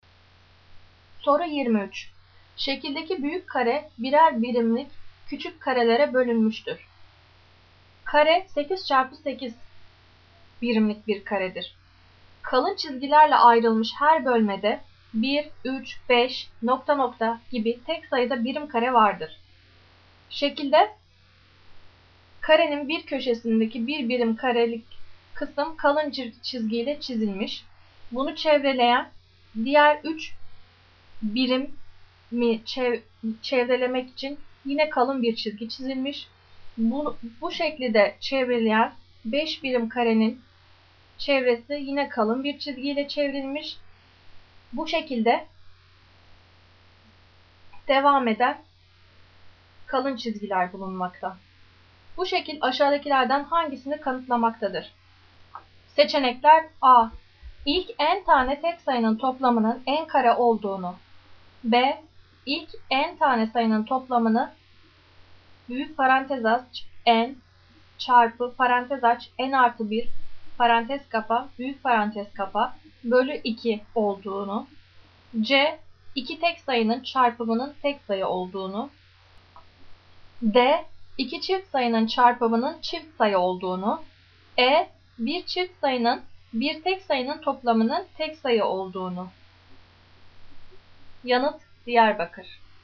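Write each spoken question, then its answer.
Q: Bu şekil aşağıdakilerden hangisini kanıtlamaktadır?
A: A: İlk n tane tek sayının toplamının n kare olduğunu.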